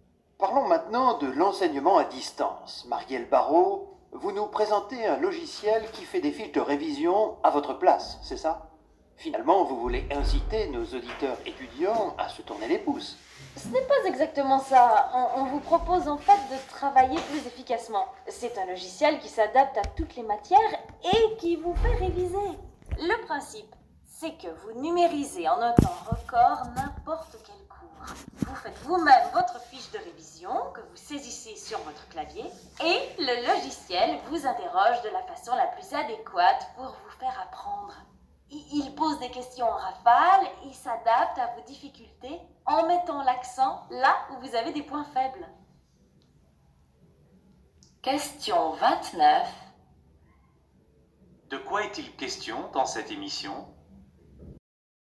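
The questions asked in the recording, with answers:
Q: De quoi est-il question dans cette émission ?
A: D'un logiciel qui aide les étudiants à réviser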